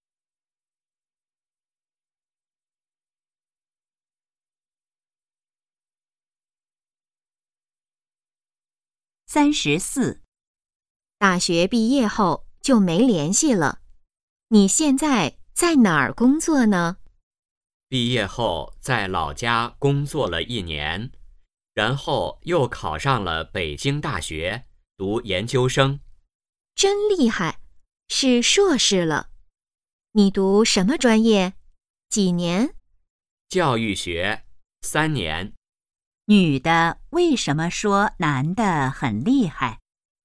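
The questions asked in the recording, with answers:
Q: 女的为什么说男的很厉害?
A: 他考上北京大学读研究生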